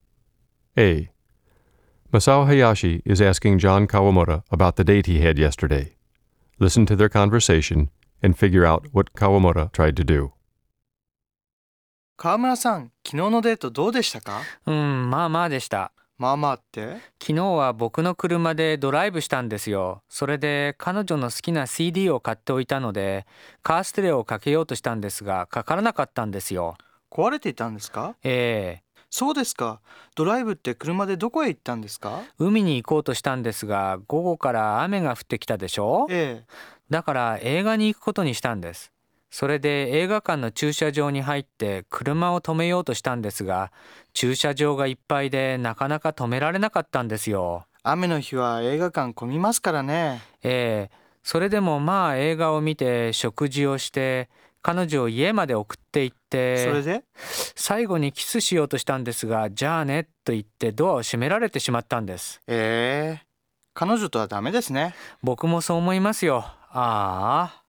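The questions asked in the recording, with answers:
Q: Listen to their conversation and figure out what Kawamoto tried to do.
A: He tried to play the car stereo (it was broken), drive to the sea (it rained), park at the movie theater (the lot was full), and kiss his date at the end (she shut the door).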